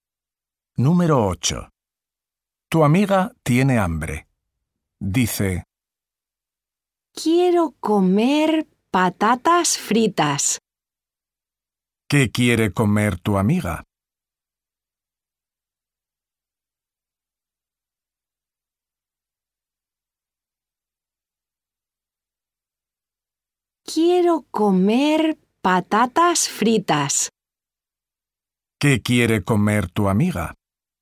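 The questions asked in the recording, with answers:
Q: ¿Qué quiere comer tu amiga?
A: patatas fritas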